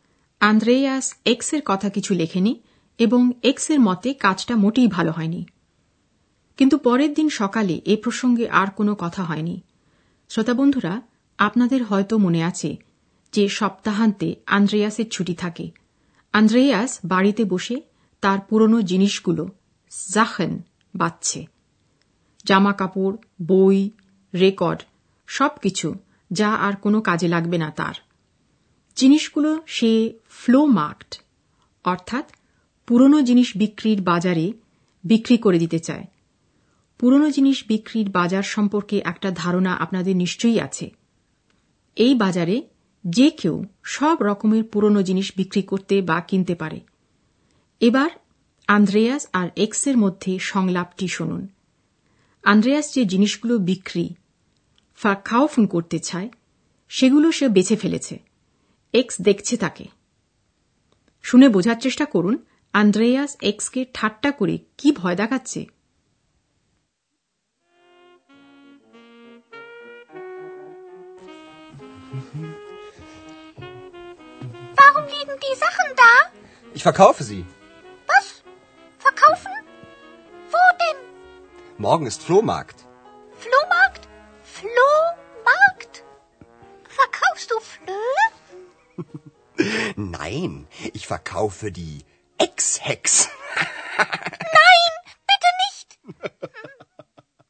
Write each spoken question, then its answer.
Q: আন্দ্রেয়াস এক্সকে ঠাট্টা করে কি ভয় দেখাচ্ছে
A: আন্দ্রেয়াস এক্সকে এই বলে ভয় দেখাচ্ছে যে সে তার জিনিসগুলোর মতোই এক্সকেও বিক্রি করে দেবে